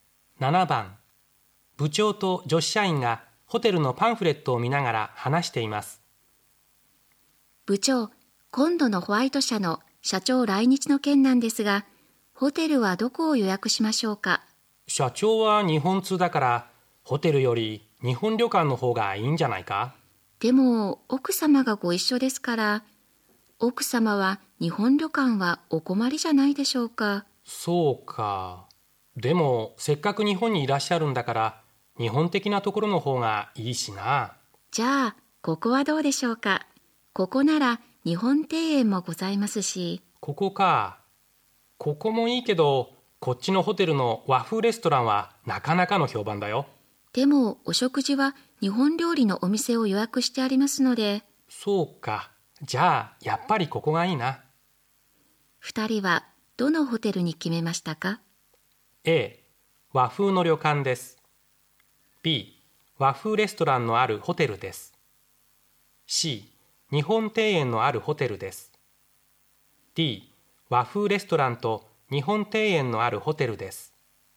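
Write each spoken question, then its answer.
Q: 2人はどのホテルに決めましたか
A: C: 日本庭園のあるホテルです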